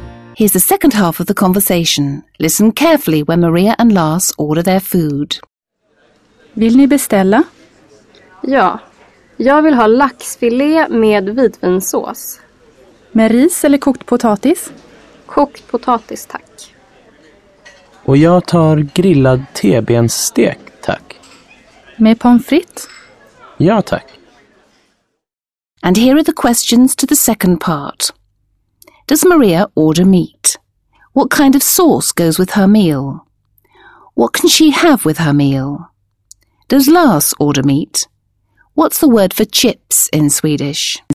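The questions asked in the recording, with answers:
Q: Does Maria order meat?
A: No, she orders salmon fillet (laxfilé)

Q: What kind of sauce goes with her meal?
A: White wine sauce (vitvinsås)

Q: What can she have with her meal?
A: Rice or boiled potatoes (she chooses boiled potatoes)

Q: Does Lars order meat?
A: Yes, grilled T-bone steak

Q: What's the word for chips in Swedish?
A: Pommes frites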